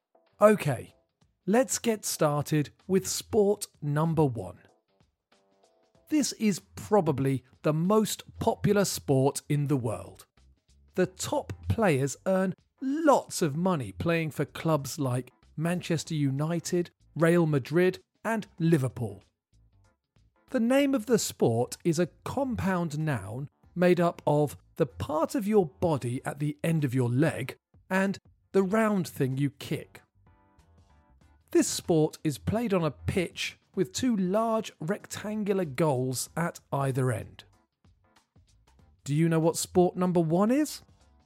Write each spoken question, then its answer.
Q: Do you know what sport number one is?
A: The answer is football, or soccer in American English.